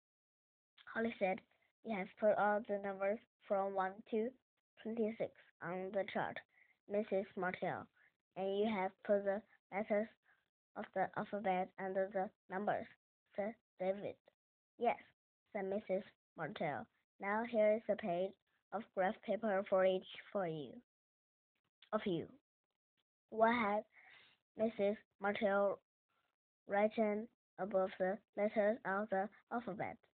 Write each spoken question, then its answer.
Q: What had Mrs. Martell written above the letters of the alphabet?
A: She had written the numbers 1 to 26.